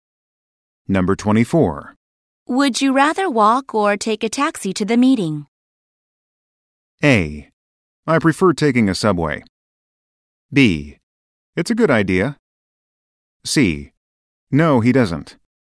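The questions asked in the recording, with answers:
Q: Would you rather walk or take a taxi to the meeting?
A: A: I prefer taking a subway.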